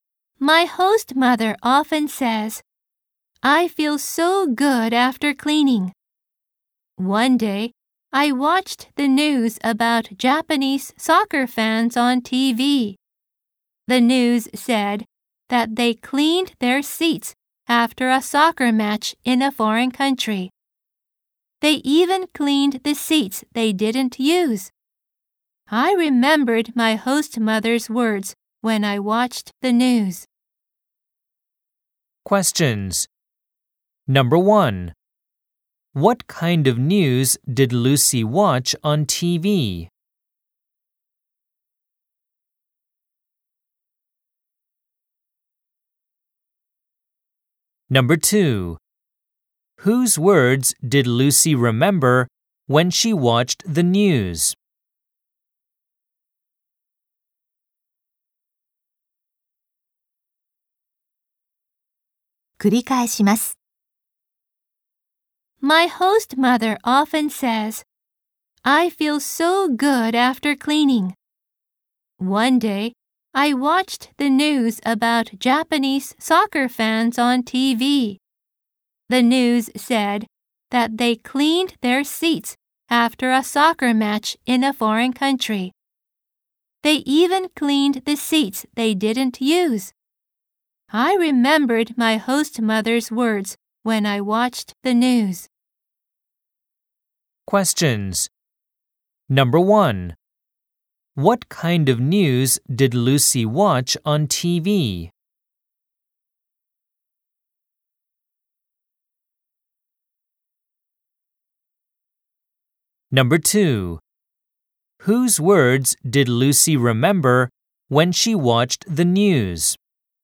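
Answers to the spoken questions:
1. News about Japanese soccer fans cleaning their seats after a match abroad
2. Her host mother's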